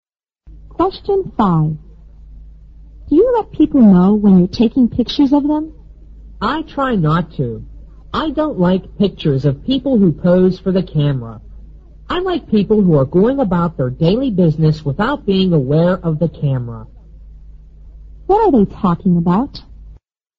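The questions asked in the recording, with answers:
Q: What are they talking about?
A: Taking pictures of people (candid photography)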